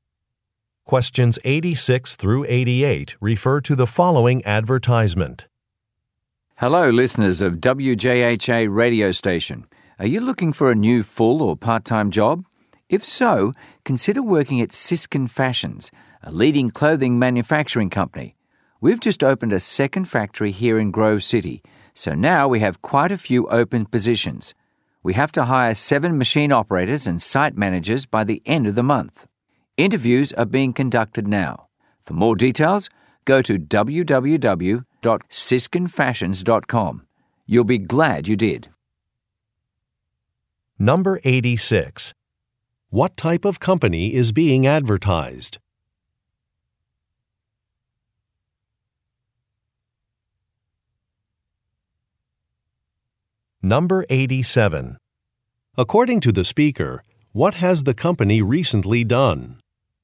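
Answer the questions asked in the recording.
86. A clothing manufacturer
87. Opened a second factory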